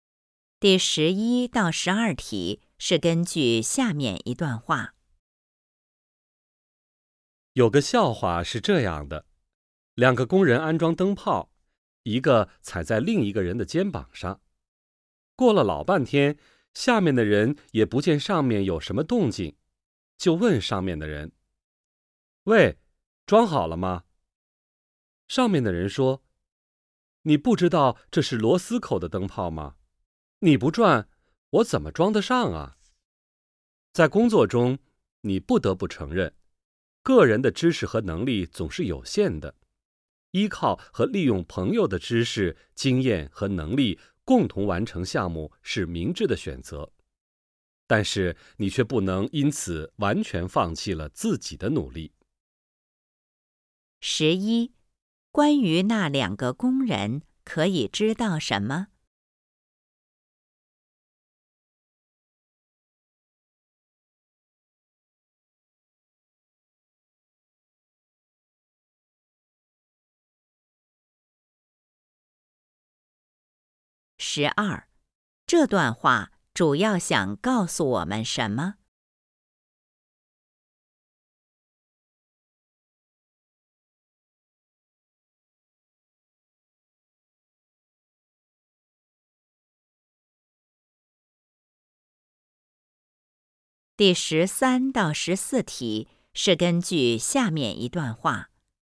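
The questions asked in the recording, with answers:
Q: 关于那两个工人可以知道什么?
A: 下面的人没有转,所以灯泡装不上

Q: 这段话主要想告诉我们什么?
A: 可以依靠朋友,但不能完全放弃自己的努力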